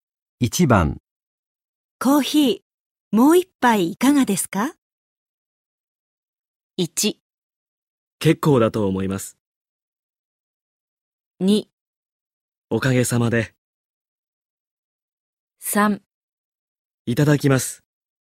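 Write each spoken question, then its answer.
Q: ヒーもう一杯いかがですか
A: 3: いただきます。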